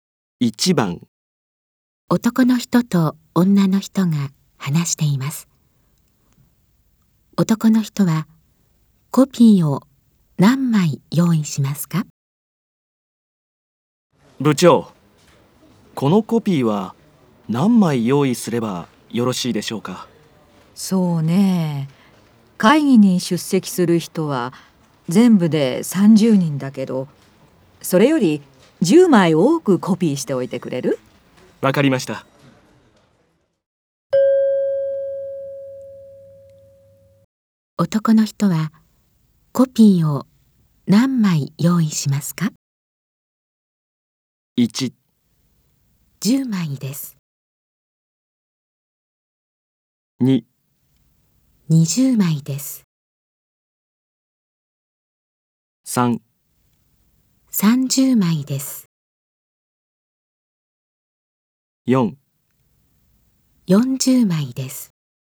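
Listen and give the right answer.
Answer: 4: 40枚です。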